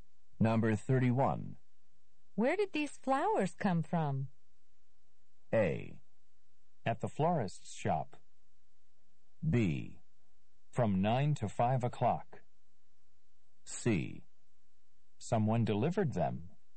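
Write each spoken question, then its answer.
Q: Where did these flowers come from?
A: C: Someone delivered them.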